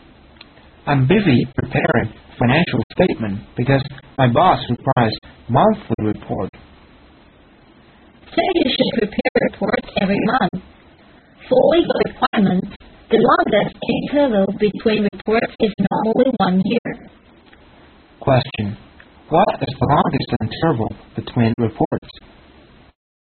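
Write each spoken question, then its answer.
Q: What is the longest interval between reports?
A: Normally 1 year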